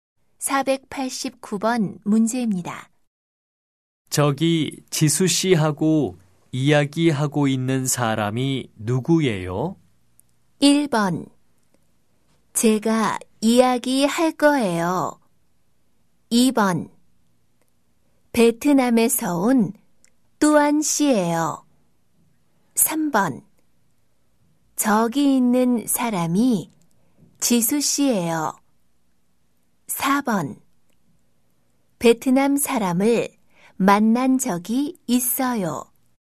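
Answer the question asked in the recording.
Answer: 2: 베트남에서 온 뚜안 씨예요.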